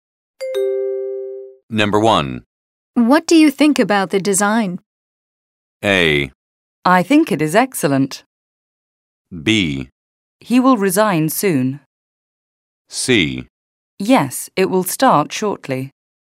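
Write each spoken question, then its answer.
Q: What do you think about the design?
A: A: I think it is excellent.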